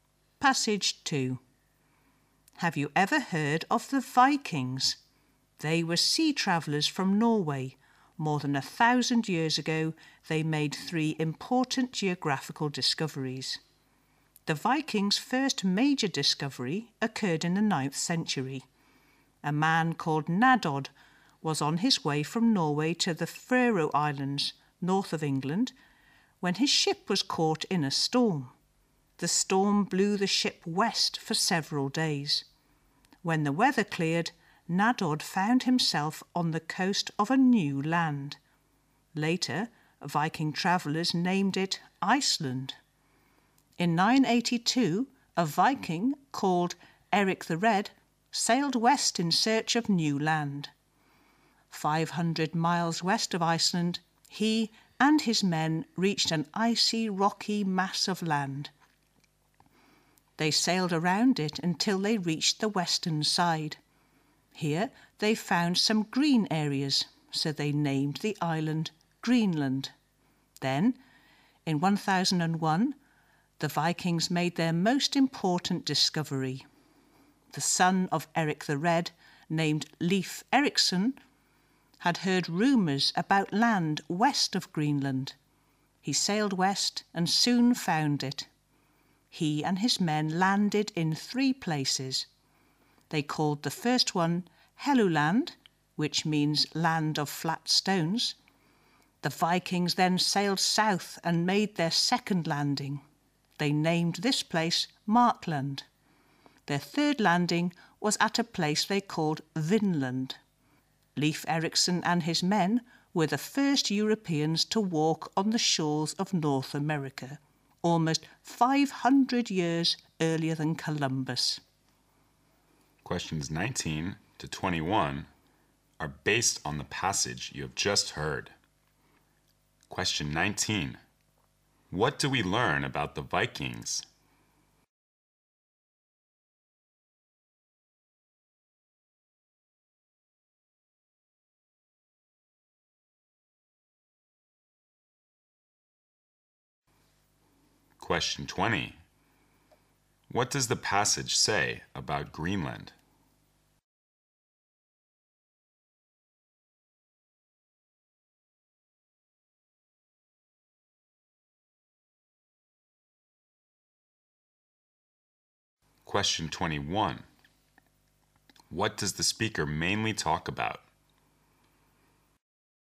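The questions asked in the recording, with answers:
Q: What do we learn about the Vikings?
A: They were sea travellers from Norway who made three important geographical discoveries

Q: What does the passage say about Greenland?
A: It was named for the green areas found on its western side

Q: What does the speaker mainly talk about?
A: The Vikings' geographical discoveries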